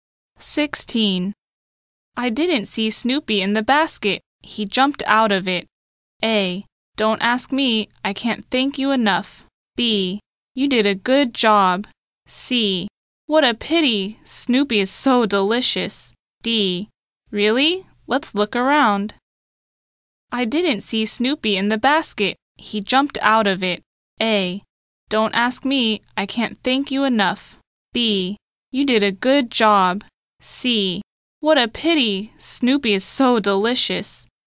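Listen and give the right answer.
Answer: D: Really? Let's look around.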